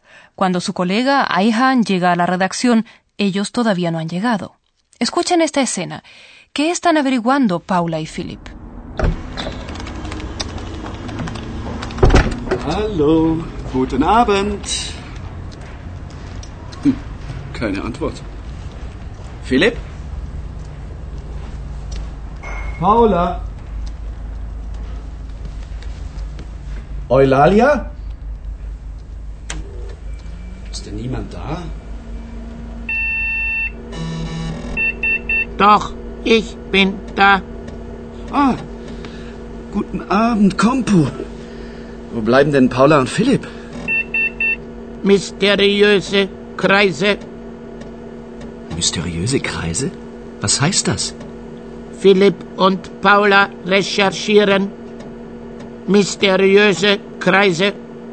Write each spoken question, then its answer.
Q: ¿Qué están averiguando Paula y Philip?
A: Paula y Philipp están averiguando algo misterioso.